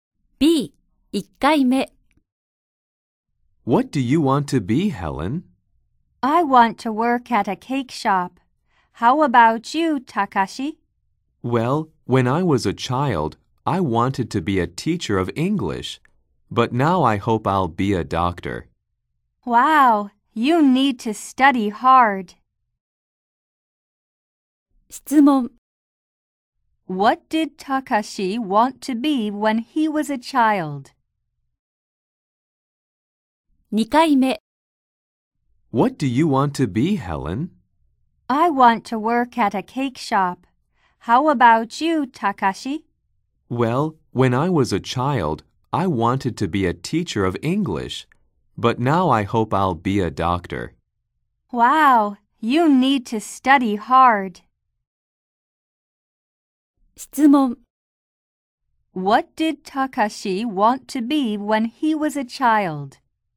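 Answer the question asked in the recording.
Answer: A teacher of English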